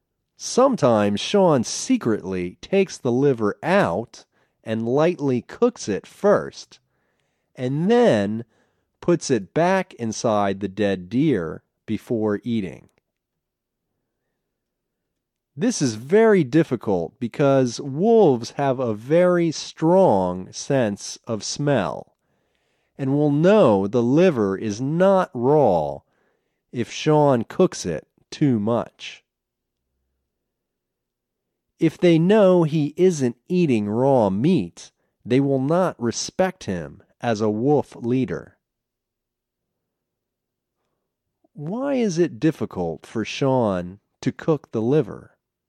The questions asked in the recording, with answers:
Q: Why is it difficult for Sean to cook the liver?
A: Wolves have a strong sense of smell.